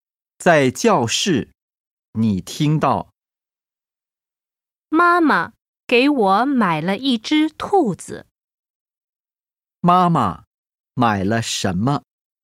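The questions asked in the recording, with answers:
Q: 妈妈买了什么?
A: 一只兔子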